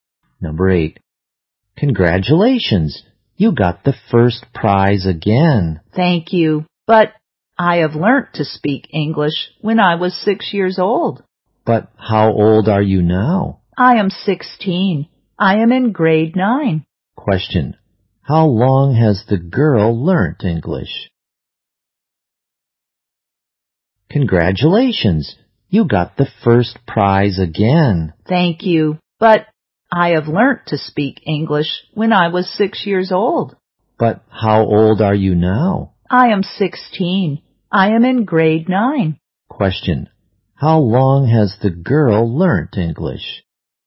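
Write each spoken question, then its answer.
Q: How long has the girl learnt English?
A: For 10 years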